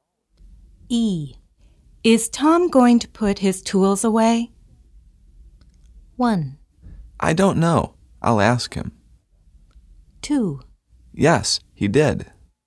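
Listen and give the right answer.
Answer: 1: I don't know. I'll ask him.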